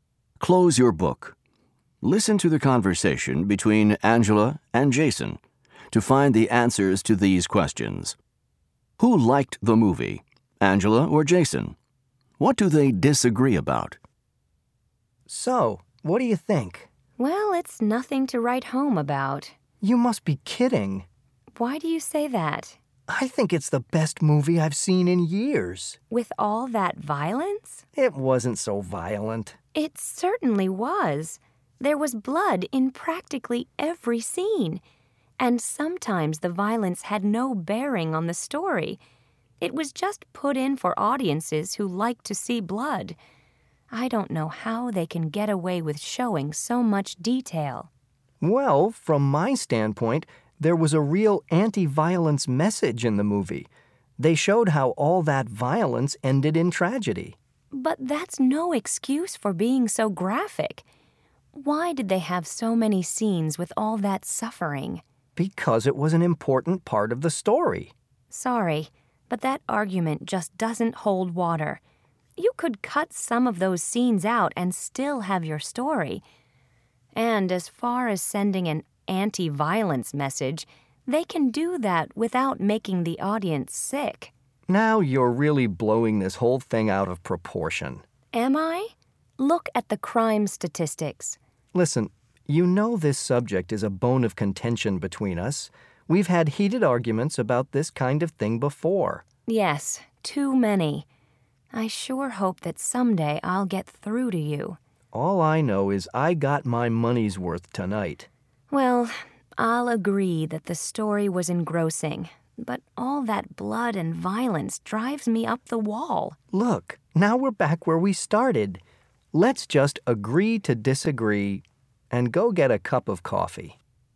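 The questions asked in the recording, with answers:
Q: What do they disagree about?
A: The violence in the movie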